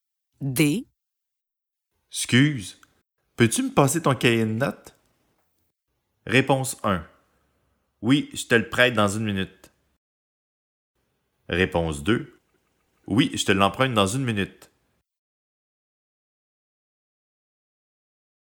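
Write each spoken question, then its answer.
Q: Excuse, peux-tu me passer ton cahier de notes?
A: 1: Oui, je te le prête dans 1 minute.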